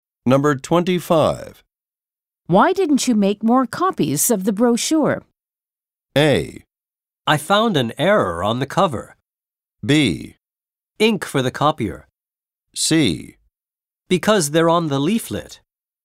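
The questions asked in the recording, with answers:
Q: Why didn't you make more copies of the brochure?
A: A: I found an error on the cover.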